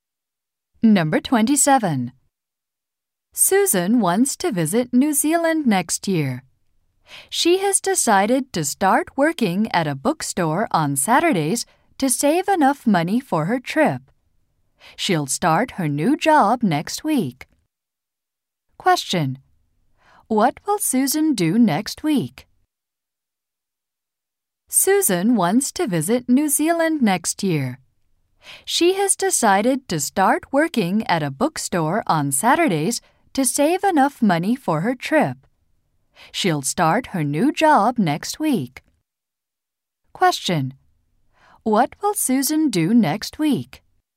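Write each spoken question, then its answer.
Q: Question. What will Susan do next week?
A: Start working at a bookstore.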